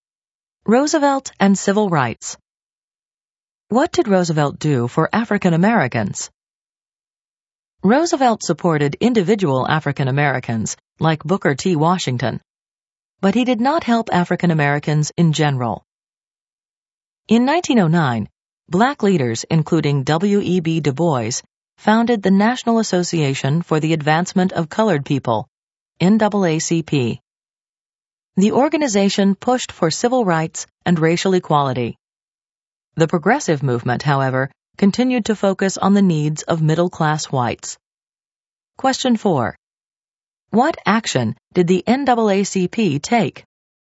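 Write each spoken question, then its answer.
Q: What action did the NAACP take?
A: It pushed for civil rights and racial equality.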